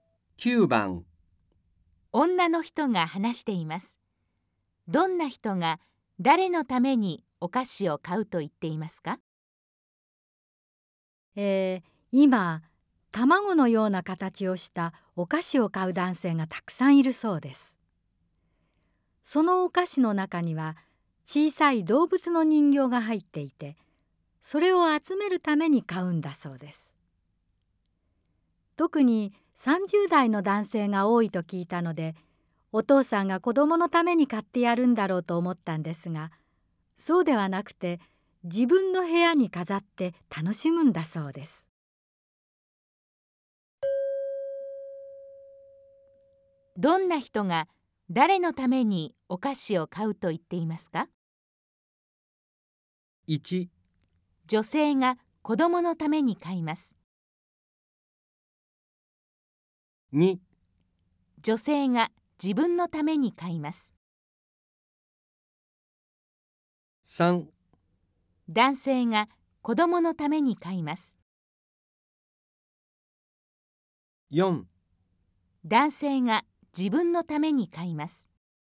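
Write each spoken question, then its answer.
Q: どんな人が誰のためにお菓子を買うと言っていますか?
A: 4: 男性が自分のために買います。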